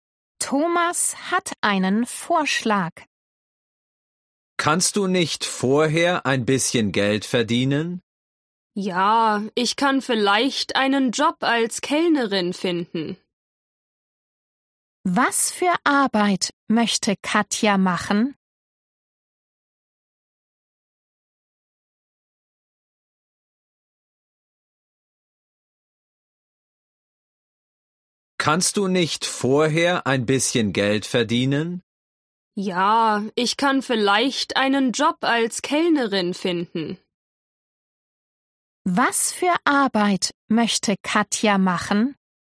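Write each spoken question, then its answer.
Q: Was für Arbeit möchte Katja machen?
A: Als Kellnerin arbeiten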